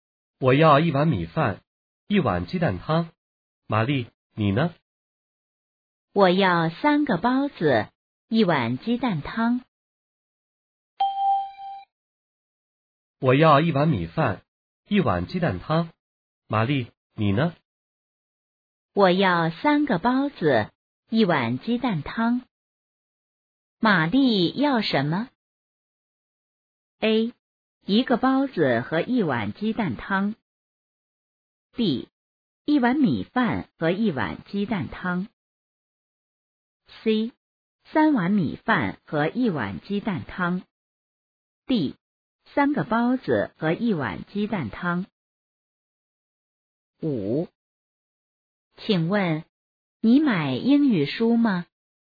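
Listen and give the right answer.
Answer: D: 三个包子和一碗鸡蛋汤。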